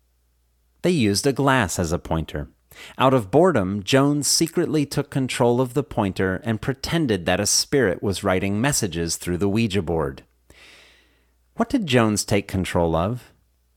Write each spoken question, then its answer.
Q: What did Jones take control of?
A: Jones took control of the pointer.